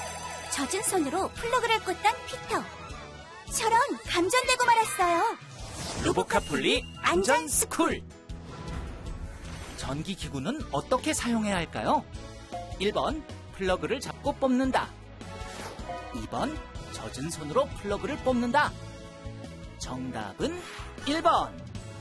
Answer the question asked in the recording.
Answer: 정답은 1번.